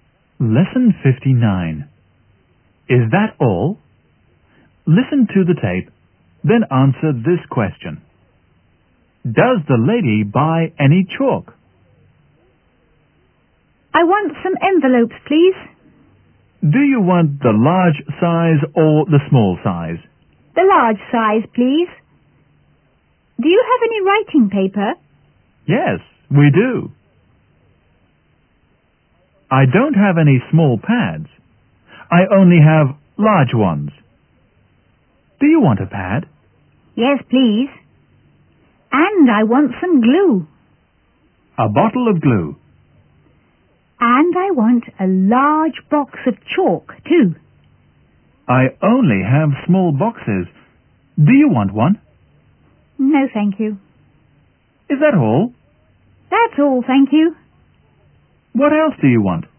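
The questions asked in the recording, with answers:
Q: Does the lady buy any chalk?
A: No, she doesn't.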